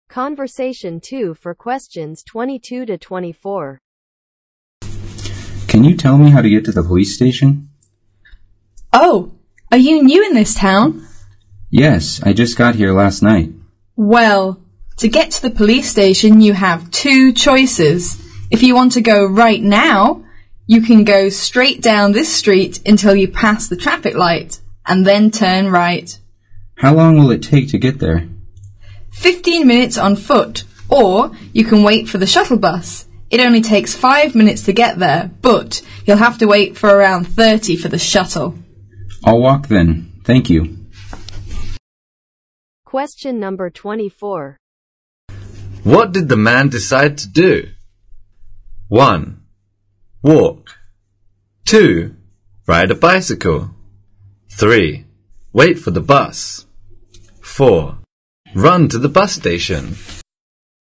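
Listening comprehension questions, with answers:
What did the man decide to do?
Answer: Walk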